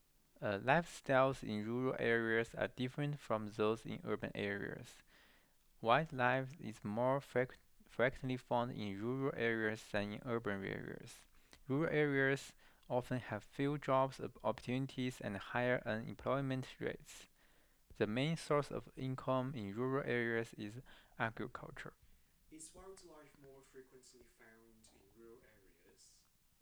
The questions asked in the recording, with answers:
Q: Is wildlife more frequently found in rural areas?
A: Yes, the wildlife is more frequently found in rural areas.